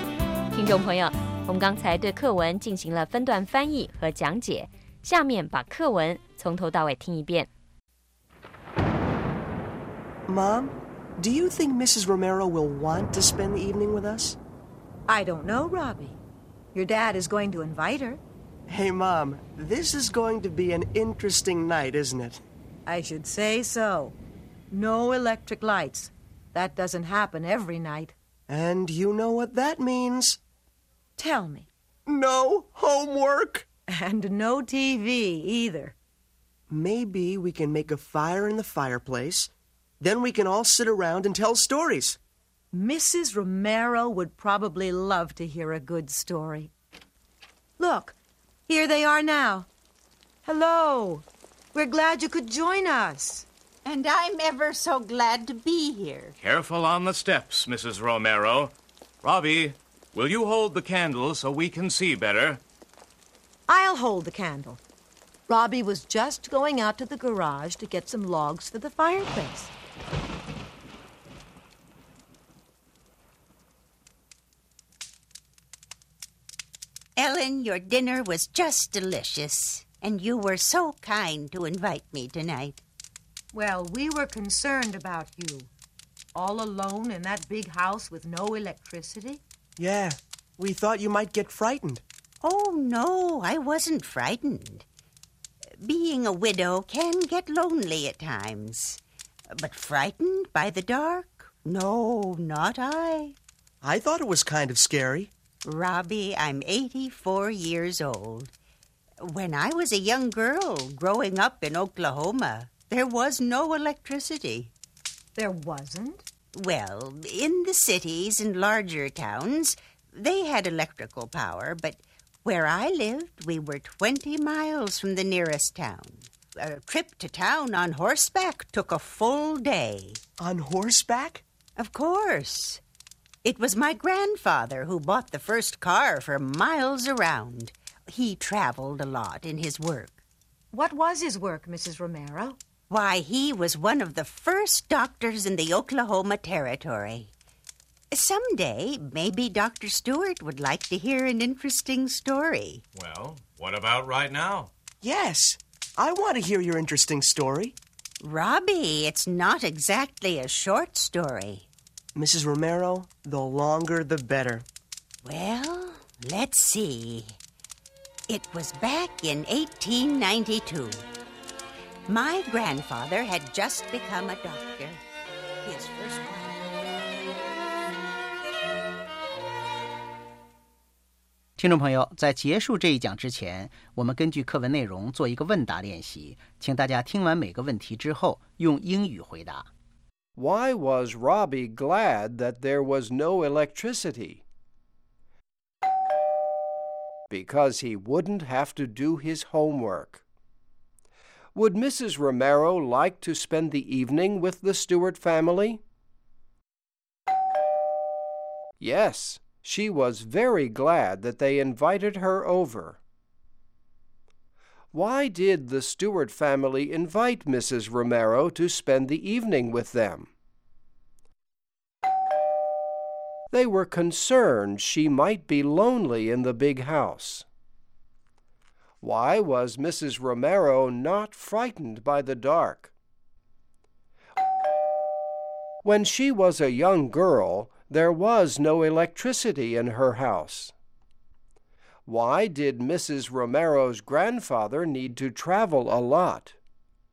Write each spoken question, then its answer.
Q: Why was Robbie glad that there was no electricity?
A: Because he wouldn't have to do his homework.

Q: Would Mrs. Romero like to spend the evening with the Stewart family?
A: Yes, she was very glad that they invited her over.

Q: Why did the Stewart family invite Mrs. Romero to spend the evening with them?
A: They were concerned she might be lonely in the big house.

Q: Why did Mrs. Romero's grandfather need to travel a lot?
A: Because he was a doctor in the Oklahoma Territory.